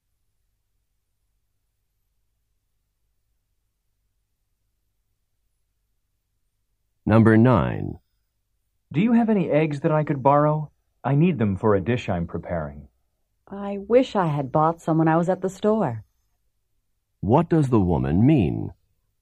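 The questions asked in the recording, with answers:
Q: What does the woman mean?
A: She doesn't have any eggs.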